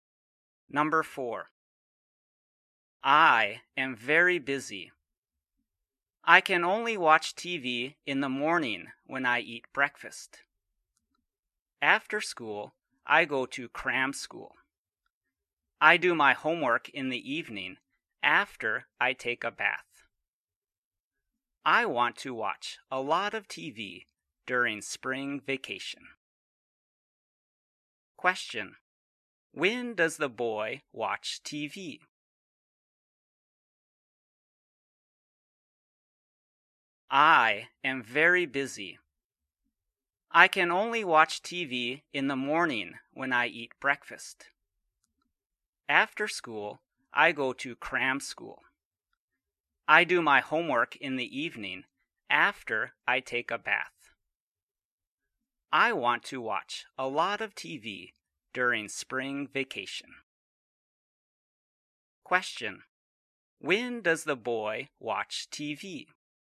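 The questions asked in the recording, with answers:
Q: When does the boy watch TV?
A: In the morning when he eats breakfast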